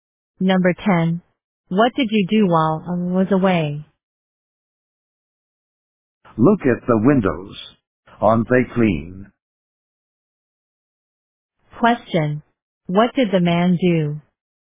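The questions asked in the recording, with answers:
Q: What did the man do?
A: He cleaned the windows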